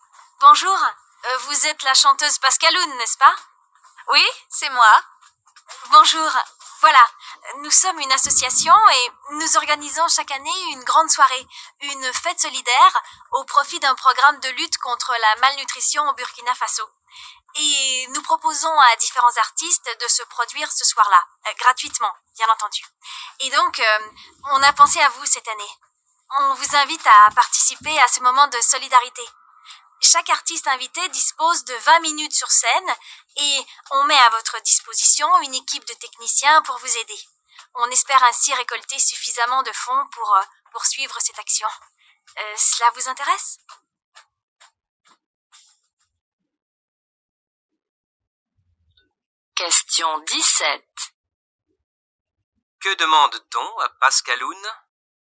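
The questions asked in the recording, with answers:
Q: Que demande-t-on à Pascaloun?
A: De chanter gratuitement lors d'une soirée solidaire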